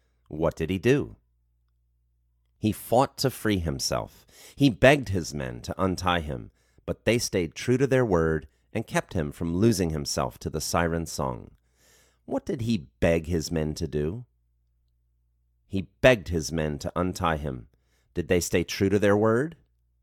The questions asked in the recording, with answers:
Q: What did he beg his men to do?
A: He begged his men to untie him.

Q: Did they stay true to their word?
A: Yes, they stayed true to their word.